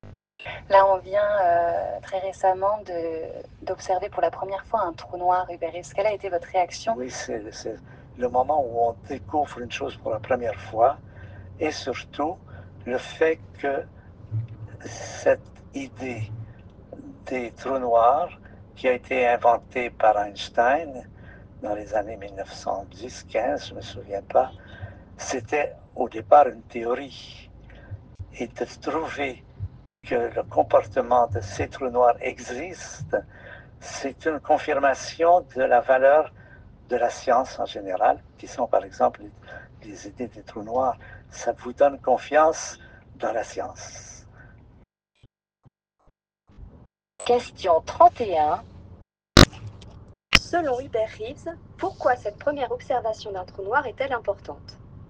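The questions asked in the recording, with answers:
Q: Selon Hubert Reeves, pourquoi cette première observation d'un trou noir est-elle importante?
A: Elle confirme une théorie (d'Einstein) et donne confiance dans la valeur de la science.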